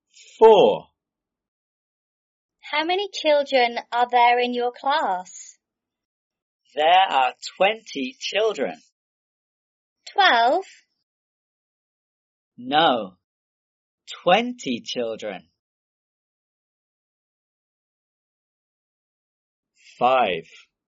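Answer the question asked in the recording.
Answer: 20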